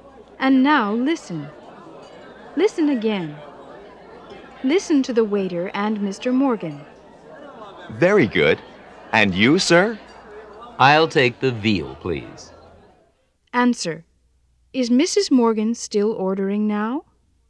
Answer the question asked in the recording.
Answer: No, she's not.